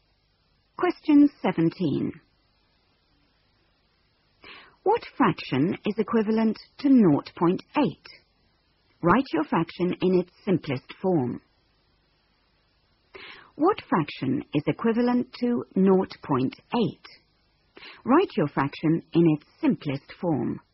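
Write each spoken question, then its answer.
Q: What fraction is equivalent to 0.8?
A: 4/5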